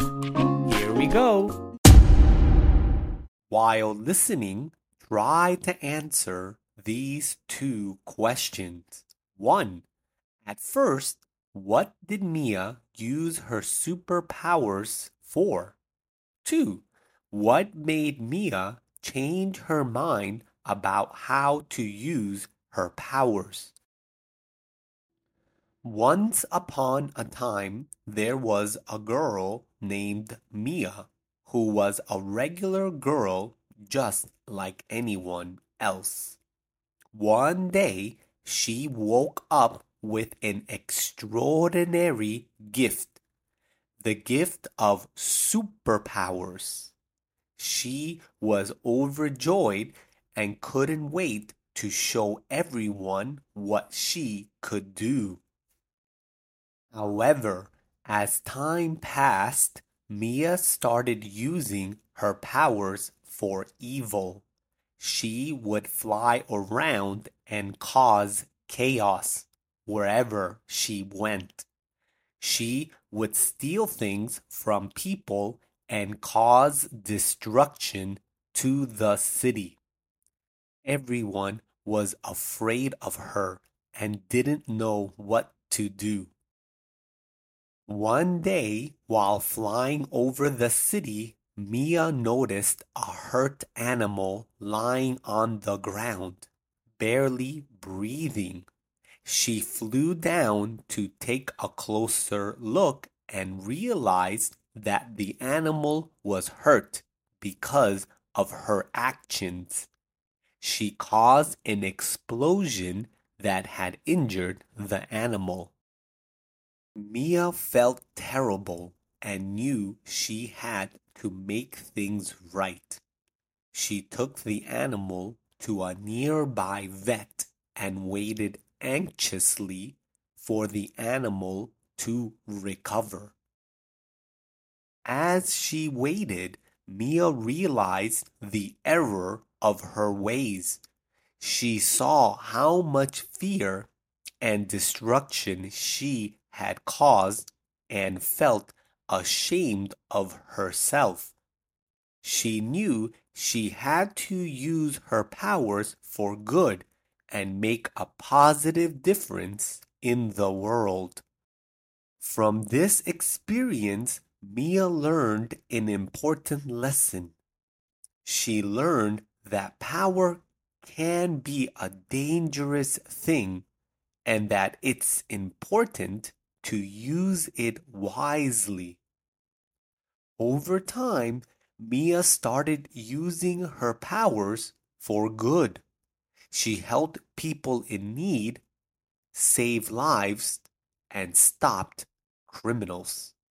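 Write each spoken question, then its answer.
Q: One, at first, what did Mia use her superpowers for?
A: For evil: causing chaos, stealing and destroying the city

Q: What made Mia change her mind about how to use her powers?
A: She found an animal hurt by an explosion she had caused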